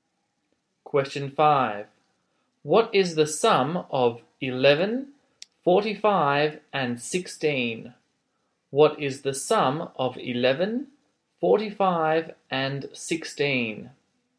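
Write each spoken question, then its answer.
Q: What is the sum of 11, 45, and 16?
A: 72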